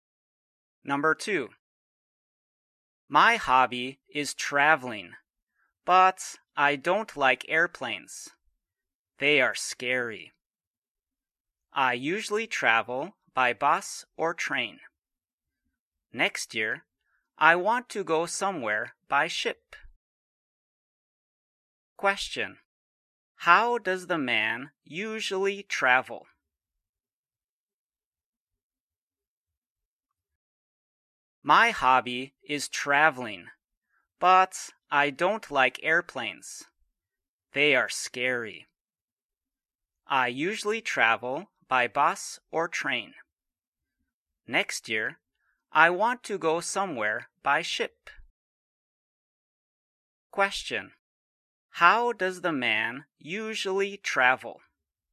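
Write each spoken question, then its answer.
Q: How does the man usually travel?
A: By bus or train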